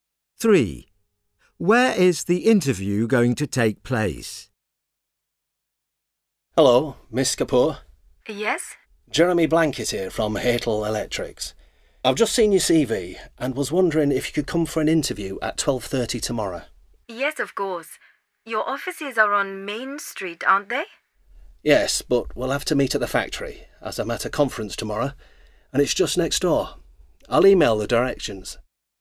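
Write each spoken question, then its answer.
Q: Where is the interview going to take place?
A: at the factory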